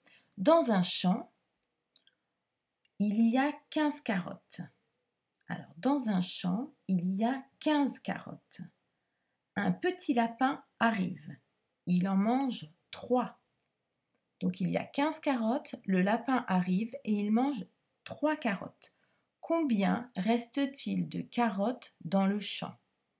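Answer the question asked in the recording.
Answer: 12 carottes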